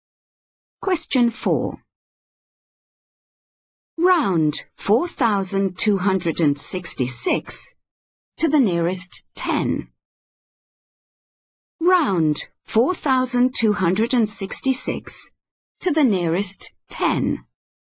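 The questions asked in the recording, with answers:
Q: Round 4,266 to the nearest 10.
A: 4,270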